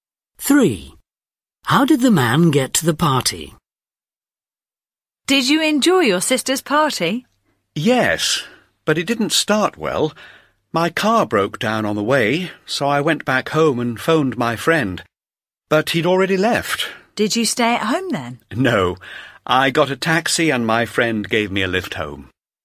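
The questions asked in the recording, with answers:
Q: How did the man get to the party?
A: by taxi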